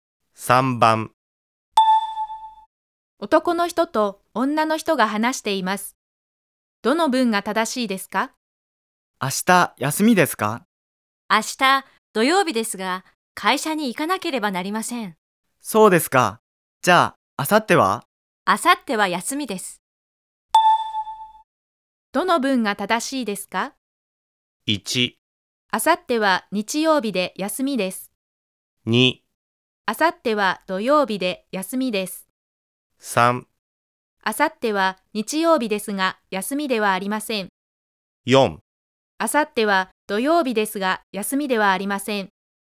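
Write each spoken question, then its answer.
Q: どの文が正しいですか?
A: 1: 明後日は日曜日で休みです。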